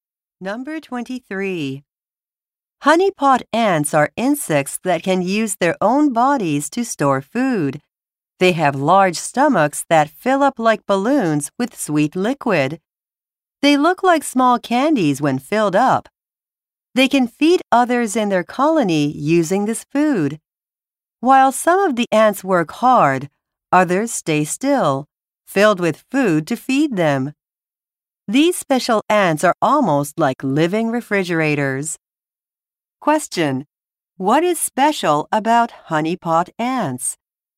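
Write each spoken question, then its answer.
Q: What is special about honeypot ants?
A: They store food in their bodies to feed others in the colony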